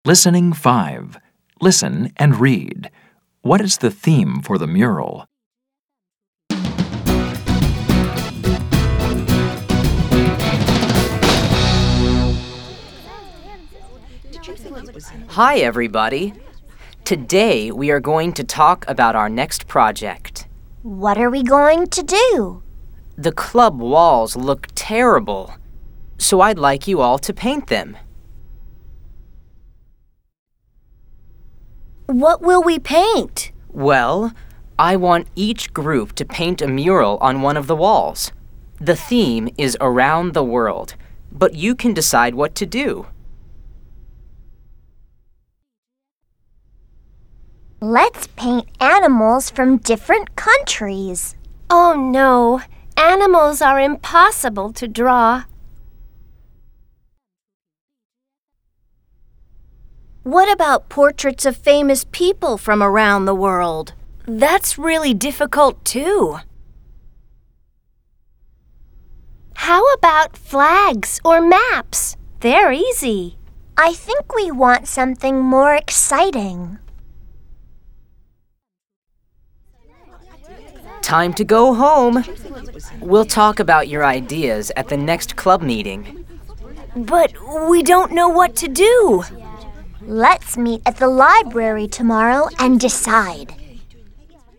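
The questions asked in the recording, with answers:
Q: What is the theme for the mural?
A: Around the world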